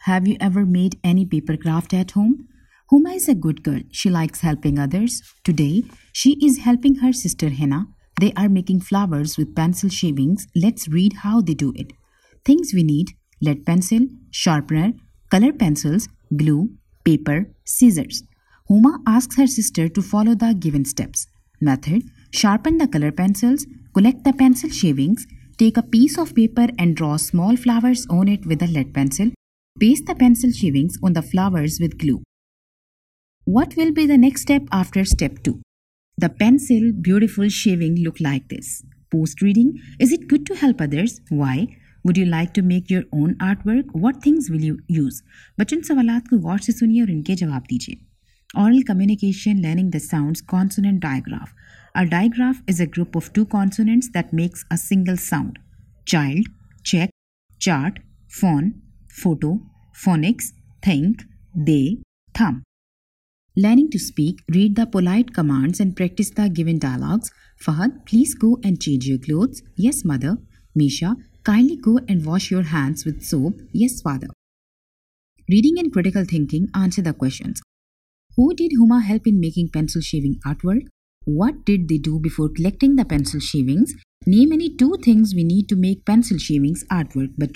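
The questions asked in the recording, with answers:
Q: Who did Huma help in making pencil shaving artwork?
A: Her sister Hina

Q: What did they do before collecting the pencil shavings?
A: They sharpened the color pencils

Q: Name any two things we need to make pencil shavings artwork.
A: Any two of: lead pencil, sharpener, color pencils, glue, paper, scissors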